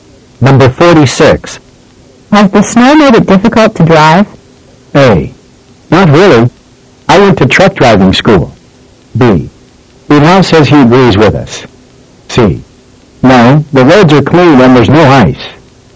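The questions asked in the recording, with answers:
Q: Has the snow made it difficult to drive?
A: C: No, the roads are clean and there's no ice.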